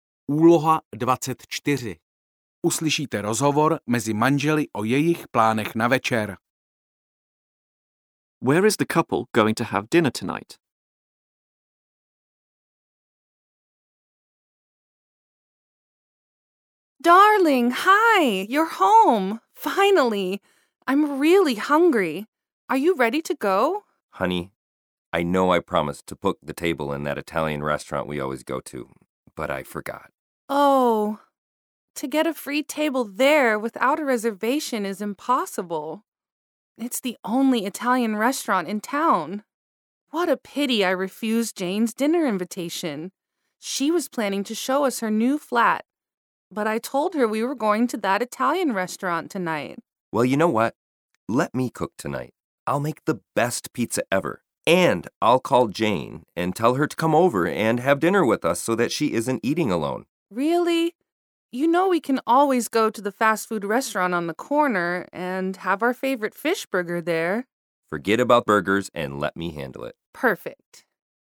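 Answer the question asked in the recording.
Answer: At home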